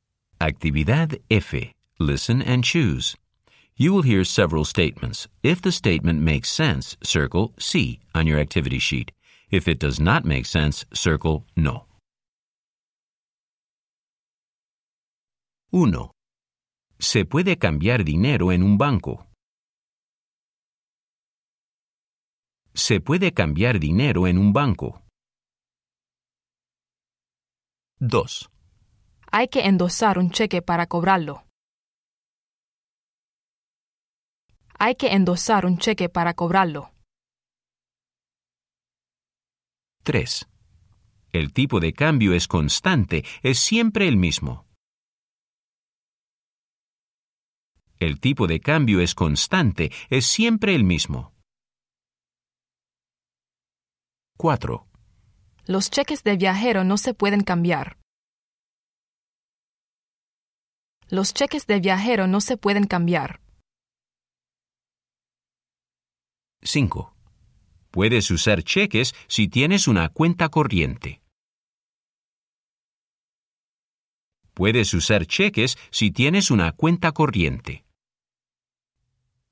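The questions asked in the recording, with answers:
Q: Se puede cambiar dinero en un banco.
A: sí

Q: Hay que endosar un cheque para cobrarlo.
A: sí

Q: El tipo de cambio es constante, es siempre el mismo.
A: no

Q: Los cheques de viajero no se pueden cambiar.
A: no

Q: Puedes usar cheques si tienes una cuenta corriente.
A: sí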